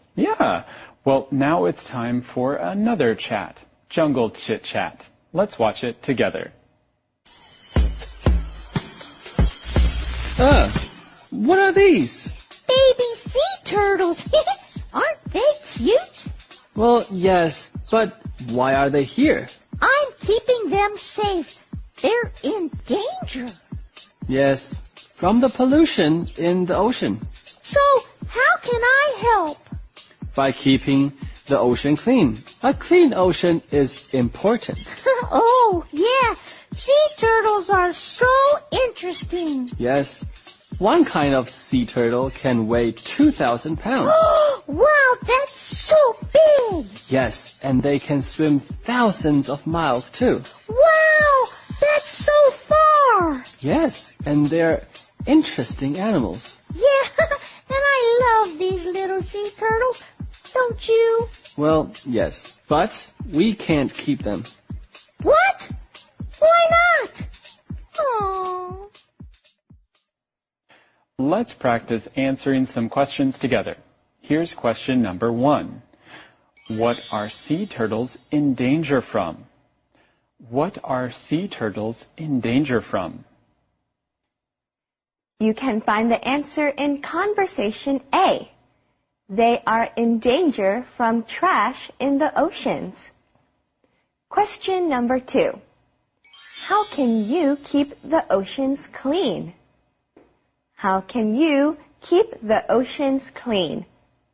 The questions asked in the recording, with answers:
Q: What are sea turtles in danger from?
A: They are in danger from trash in the oceans.